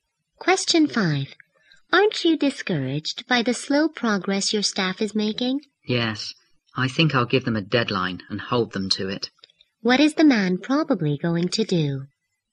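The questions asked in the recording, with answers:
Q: What is the man probably going to do?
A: Give his staff a deadline and hold them to it.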